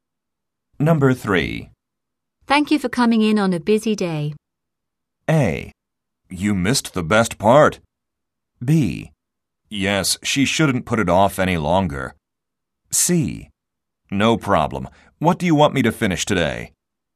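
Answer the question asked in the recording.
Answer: C: No problem. What do you want me to finish today?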